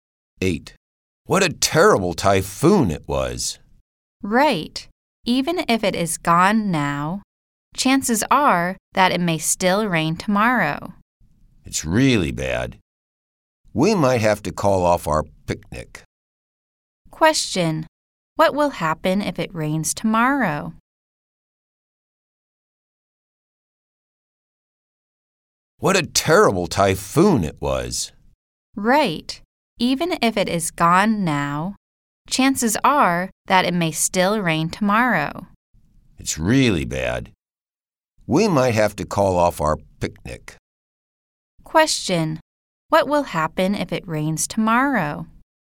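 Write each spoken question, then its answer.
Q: What will happen if it rains tomorrow?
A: They might call off their picnic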